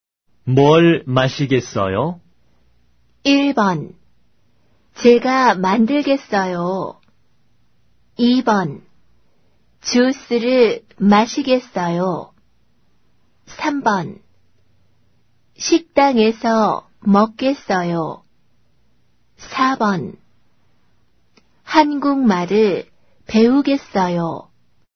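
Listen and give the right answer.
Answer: 2: 주스를 마시겠어요.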